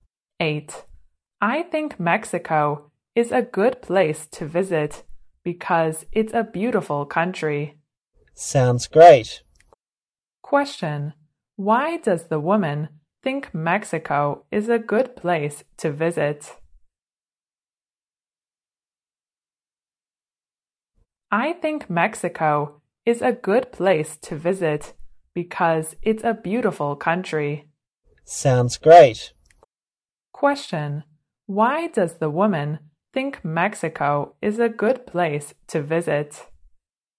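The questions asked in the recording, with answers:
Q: Why does the woman think Mexico is a good place to visit?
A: Because it's a beautiful country.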